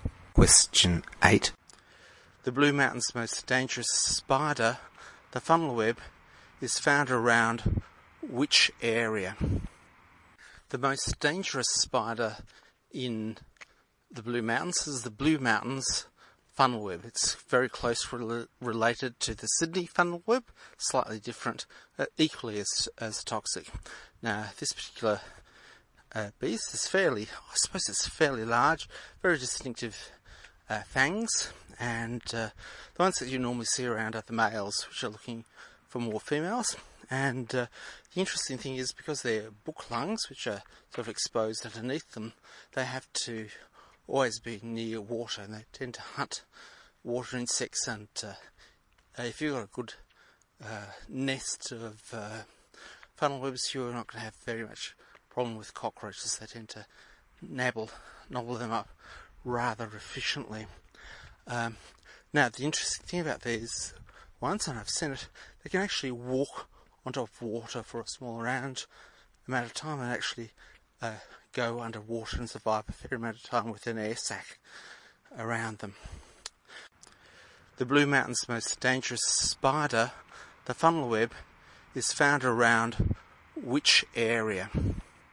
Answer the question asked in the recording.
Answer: B. Water sources.